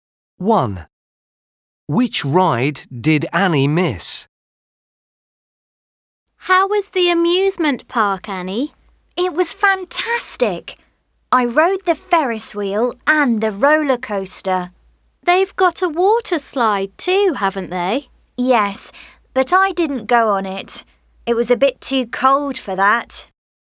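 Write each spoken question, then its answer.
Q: Which ride did Annie miss?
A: the water slide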